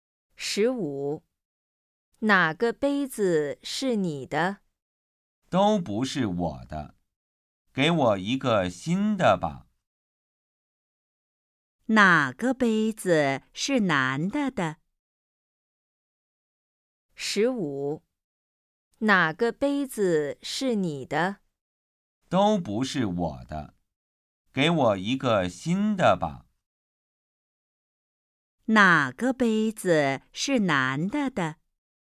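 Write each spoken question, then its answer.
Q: 哪个杯子是男的的?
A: 都不是他的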